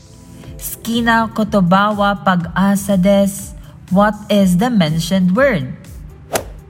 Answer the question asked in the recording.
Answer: You're right, it's pag-asa.